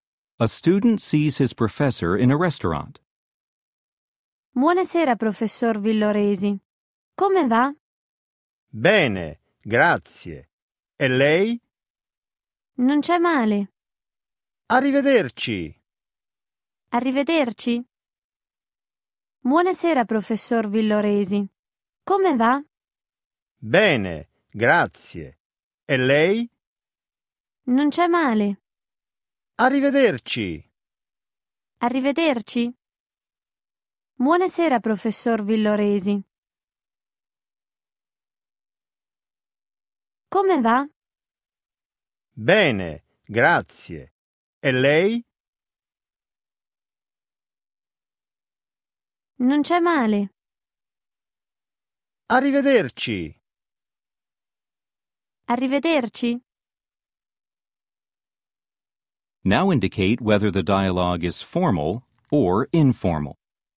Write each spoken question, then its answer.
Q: Now indicate whether the dialogue is formal or informal.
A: 2. Formale.